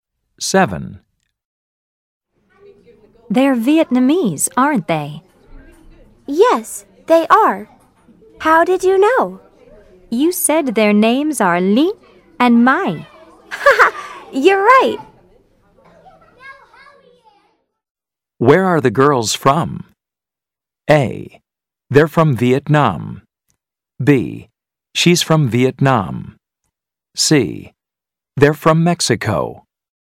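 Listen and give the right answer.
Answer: A: They're from Vietnam.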